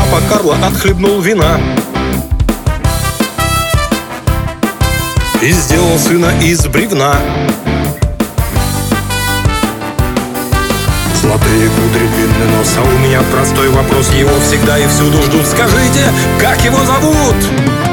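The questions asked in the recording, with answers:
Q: Скажите, как его зовут?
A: Буратино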